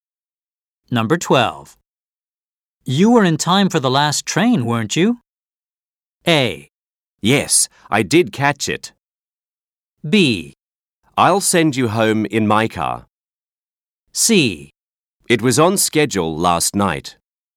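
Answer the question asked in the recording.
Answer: A: Yes, I did catch it.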